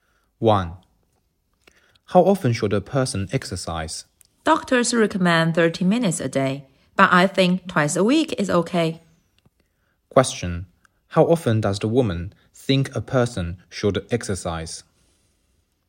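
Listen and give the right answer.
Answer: Twice a week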